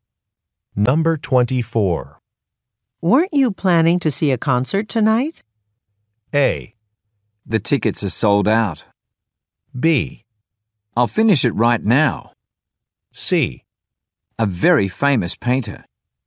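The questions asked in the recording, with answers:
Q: Weren't you planning to see a concert tonight?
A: A: The tickets are sold out.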